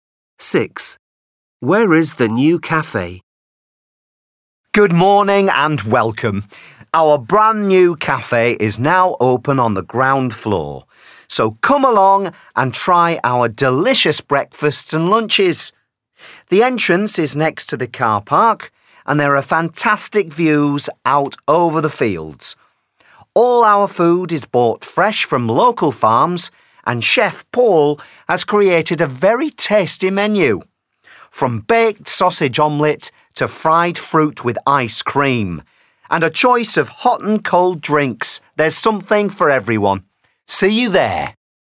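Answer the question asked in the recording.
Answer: on the ground floor, next to the car park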